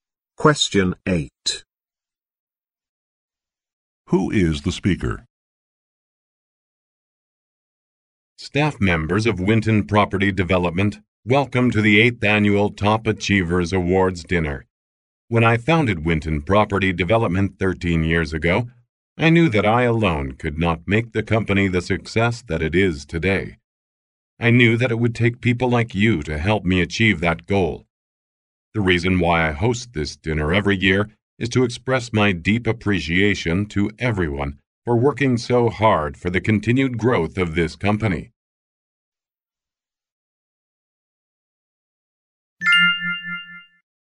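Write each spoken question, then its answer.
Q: Who is the speaker?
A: The founder of Winton Property Development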